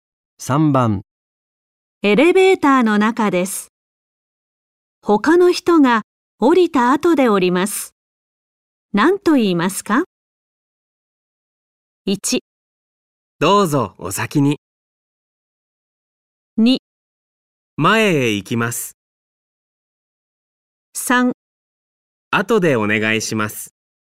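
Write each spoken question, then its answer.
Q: 何と言いますか?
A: 1: どうぞお先に。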